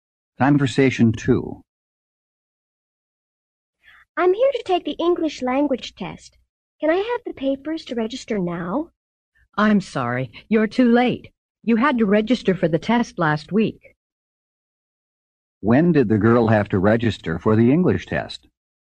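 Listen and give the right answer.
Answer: Last week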